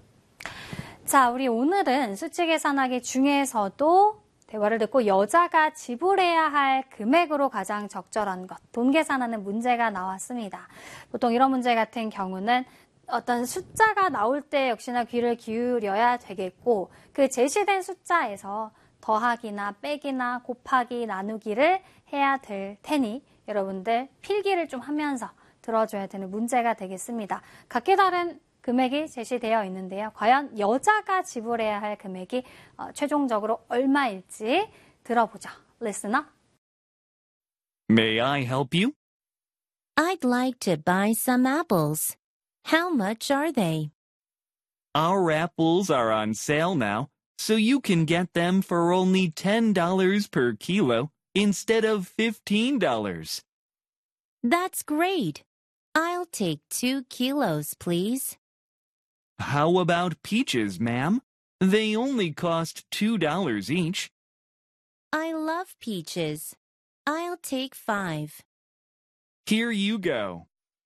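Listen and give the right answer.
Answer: 30달러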